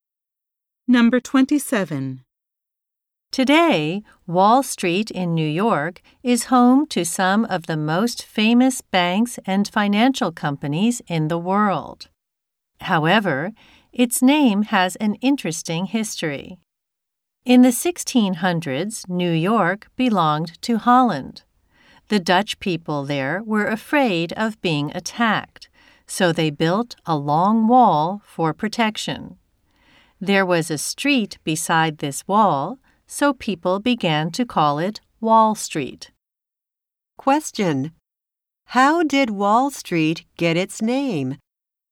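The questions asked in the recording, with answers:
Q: How did Wall Street get its name?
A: There was a protective wall beside the street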